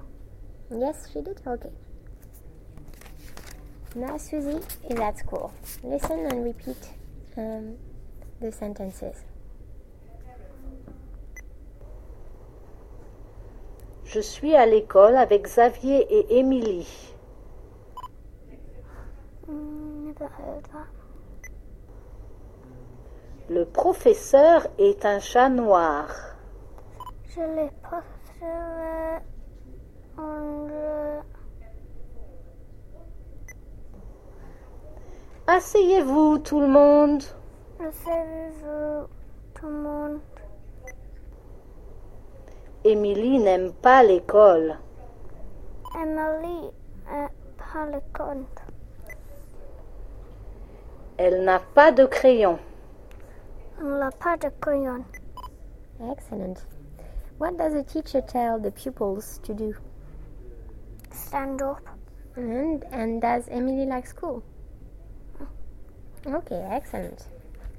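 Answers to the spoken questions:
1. Sit down
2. No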